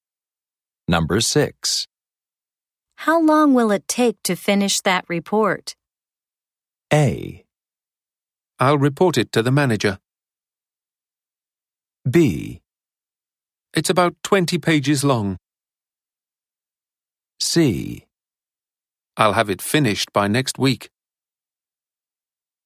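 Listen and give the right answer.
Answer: C: I'll have it finished by next week.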